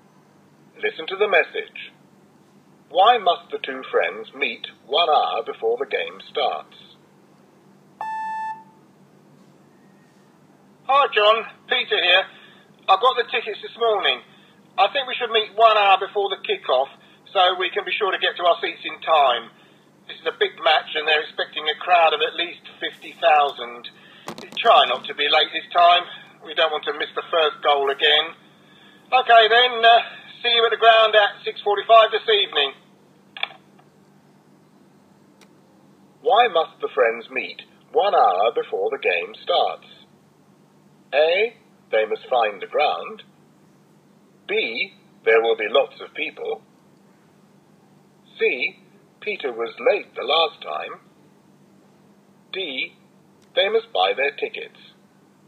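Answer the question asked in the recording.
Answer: B: there will be lots of people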